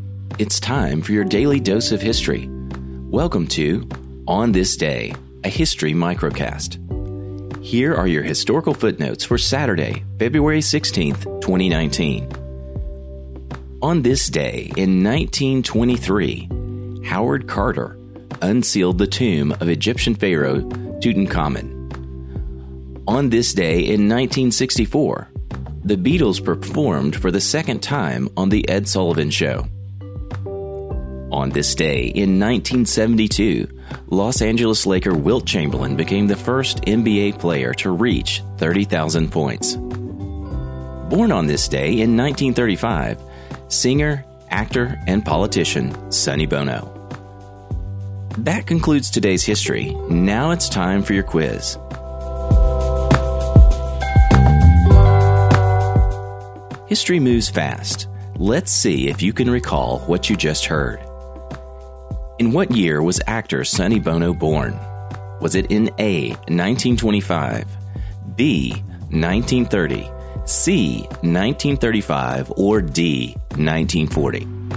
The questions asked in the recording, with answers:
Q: In what year was actor Sonny Bono born?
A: The answer is C, 1935.